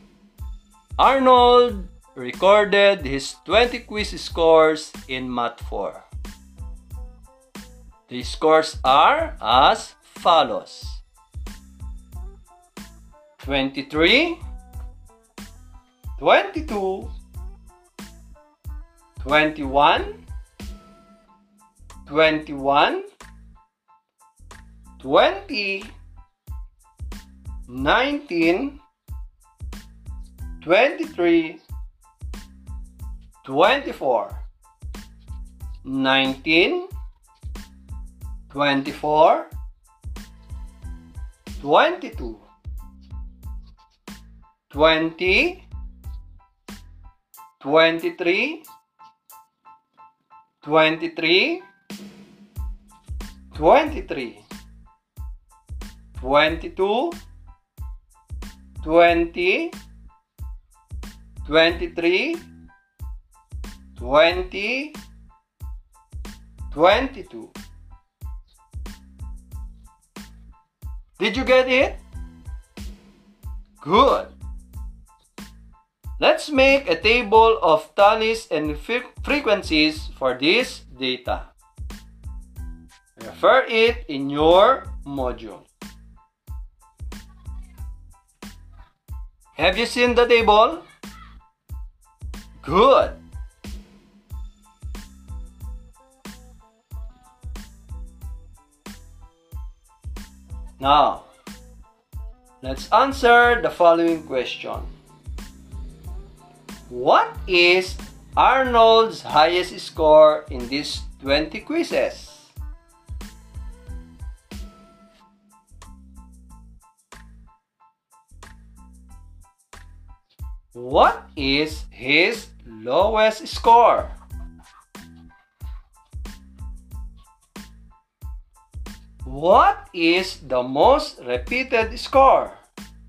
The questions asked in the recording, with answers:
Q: What is Arnold's highest score in these 20 quizzes?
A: 24 is Arnold's highest score.

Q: What is his lowest score?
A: If your answer is 19 in the second question, your answer is correct.

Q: What is the most repeated score?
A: And 23 is the most repeated score, right?